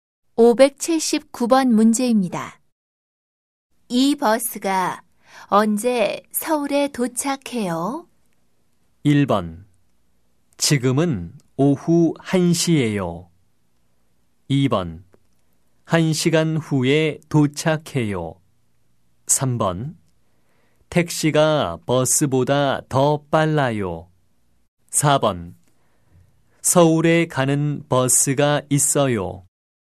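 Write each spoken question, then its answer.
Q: 이 버스가 언제 서울에 도착해요?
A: 2: 1시간 후에 도착해요.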